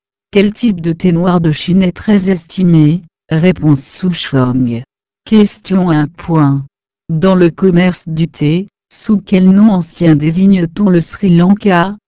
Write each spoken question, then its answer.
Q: Dans le commerce du thé, sous quel nom ancien désigne-t-on le Sri Lanka?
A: Réponse Ceylan.